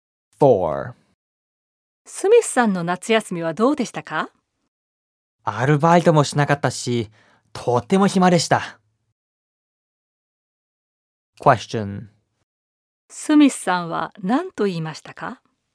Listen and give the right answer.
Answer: スミスさんはアルバイトもしなかったし、とても暇だったと言いました。